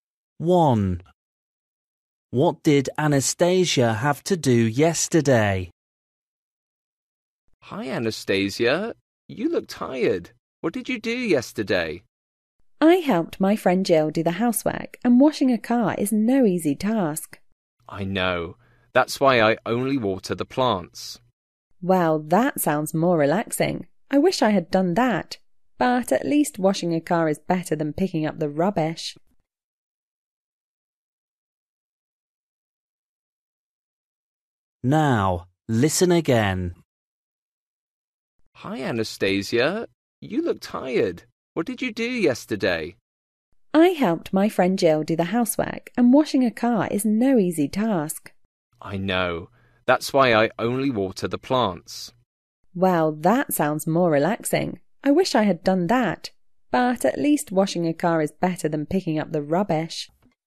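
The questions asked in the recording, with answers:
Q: What did Anastasia have to do yesterday?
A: wash a car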